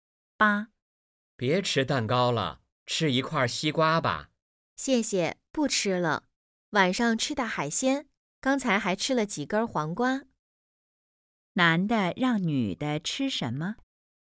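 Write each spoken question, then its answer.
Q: 男的让女的吃什么?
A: 西瓜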